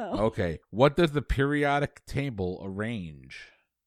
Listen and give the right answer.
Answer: Elements.